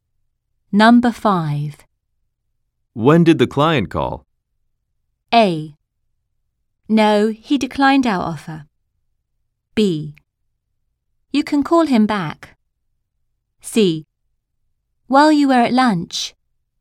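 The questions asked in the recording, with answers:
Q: When did the client call?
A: A: While you were at lunch.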